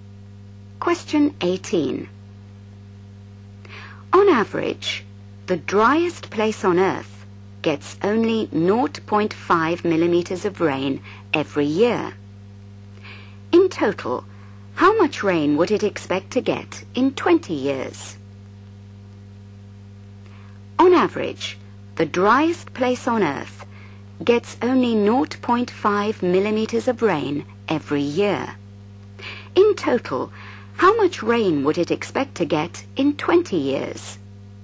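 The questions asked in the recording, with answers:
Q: In total, how much rain would it expect to get in 20 years?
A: 10 mm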